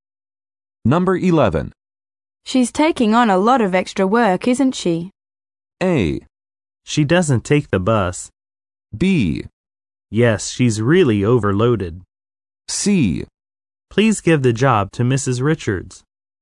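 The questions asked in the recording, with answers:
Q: She's taking on a lot of extra work, isn't she?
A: B: Yes, she's really overloaded.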